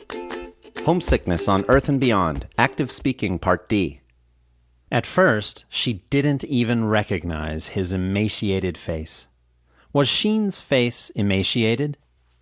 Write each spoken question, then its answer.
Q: Was Sheen's face emaciated?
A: Yes, Sheen's face was emaciated.